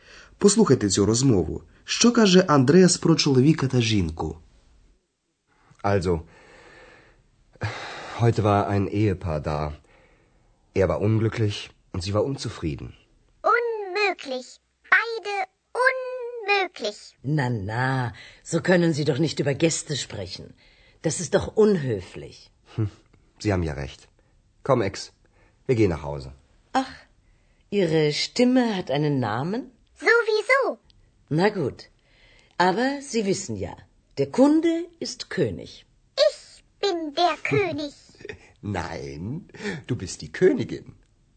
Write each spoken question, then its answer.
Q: Що каже Андреас про чоловіка та жінку?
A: Він сказав, що чоловік виглядав нещасним, а жінка незадоволеною.